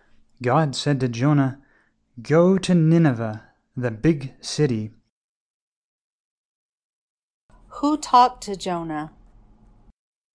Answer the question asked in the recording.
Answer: God talked to Jonah.